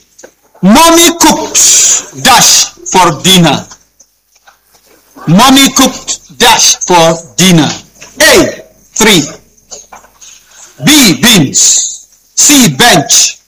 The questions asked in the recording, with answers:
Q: Mommy cooked dash for dinner.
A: B. Beans.